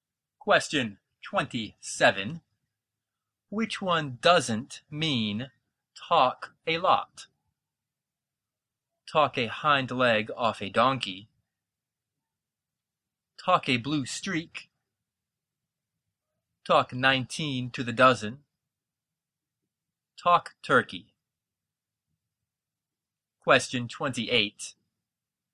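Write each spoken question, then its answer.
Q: Which one doesn't mean talk a lot?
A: D: Talk turkey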